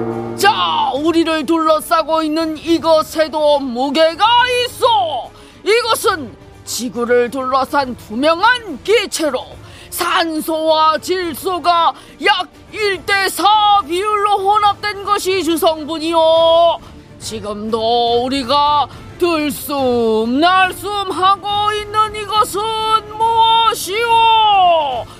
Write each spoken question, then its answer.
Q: 지금도 우리가 들숨 날숨 하고 있는 이것은 무엇이오?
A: 정답은 공기입니다